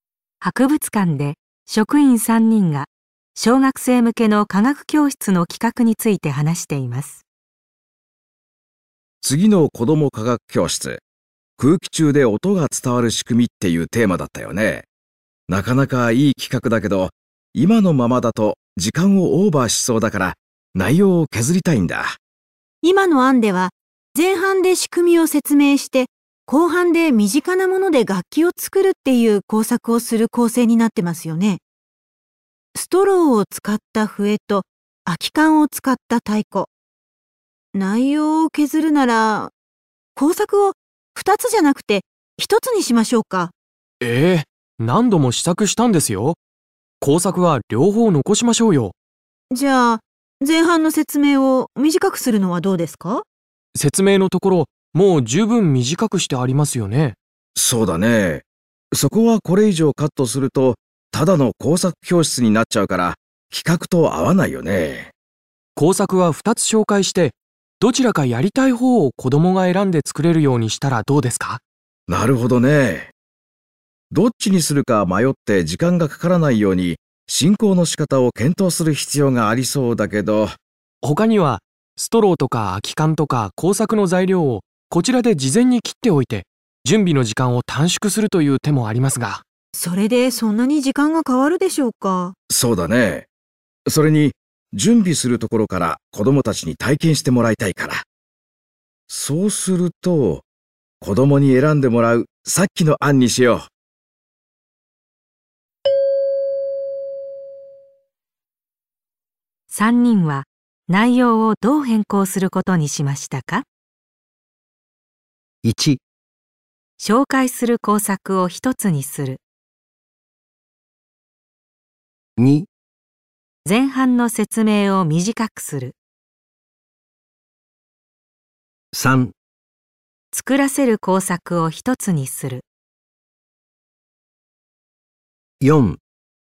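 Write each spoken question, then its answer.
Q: 3人は内容をどう変更することにしましたか?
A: 3: 作らせる工作を一つにする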